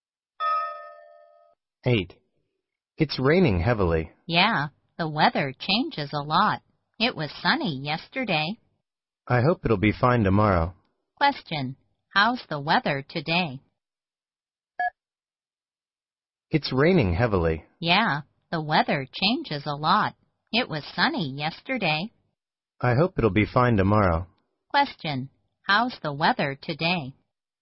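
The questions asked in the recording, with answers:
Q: How's the weather today?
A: Raining heavily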